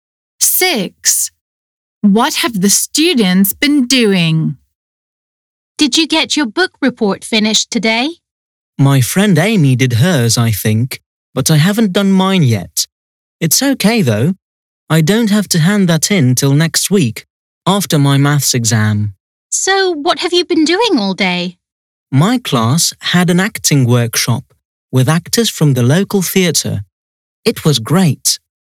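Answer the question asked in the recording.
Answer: An acting workshop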